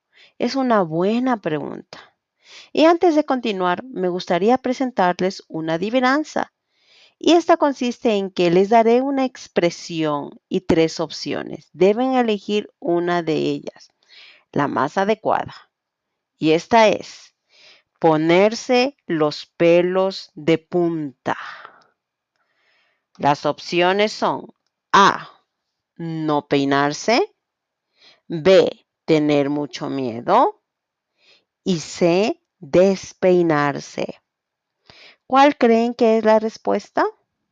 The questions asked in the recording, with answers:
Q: ¿Cuál creen que es la respuesta?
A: La respuesta correcta es tener mucho miedo.